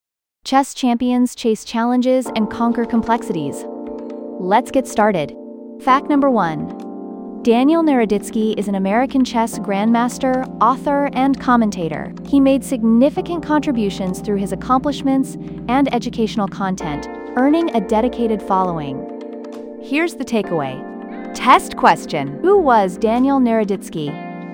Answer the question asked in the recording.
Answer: An American chess grandmaster, author, and commentator.